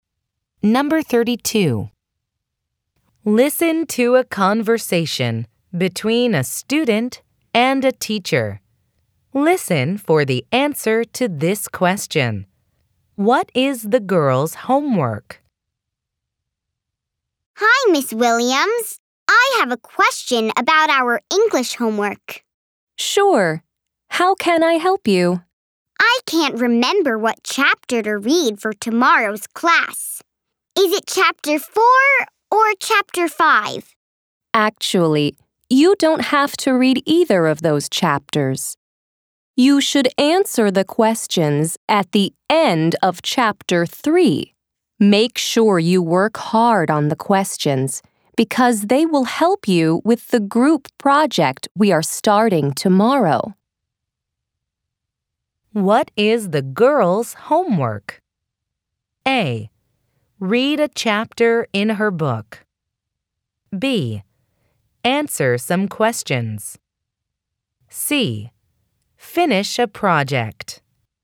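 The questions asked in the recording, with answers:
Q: What is the girl's homework?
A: B: Answer some questions.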